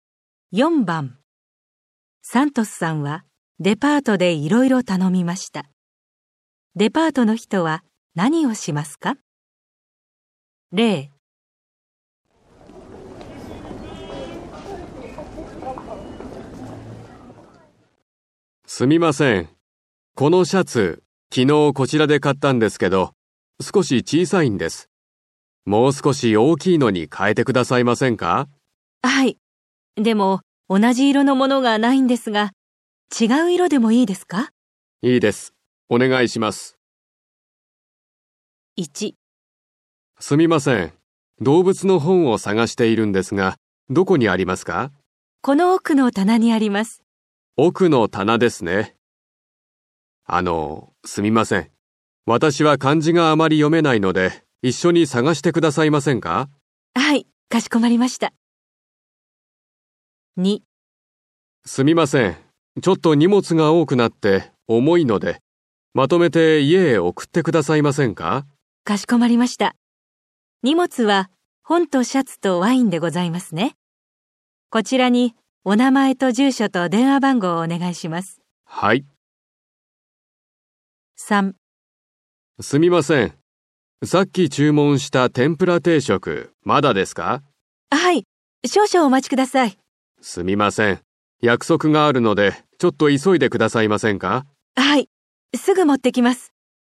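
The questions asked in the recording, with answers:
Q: デパートの人は何をしますか?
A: サントスさんと一緒に動物の本を探す

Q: デパートの人は何をしますか?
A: 荷物をまとめて家へ送る

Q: デパートの人は何をしますか?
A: 天ぷら定食をすぐ持ってくる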